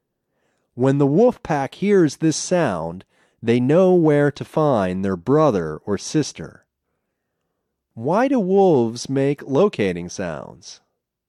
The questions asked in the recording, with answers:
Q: Why do wolves make locating sounds?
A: They make locating sounds to find their brothers and sisters.